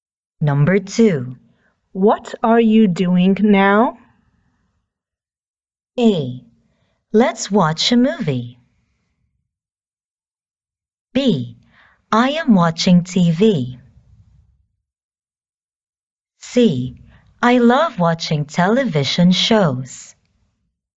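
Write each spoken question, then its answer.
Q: What are you doing now?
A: B: I am watching TV.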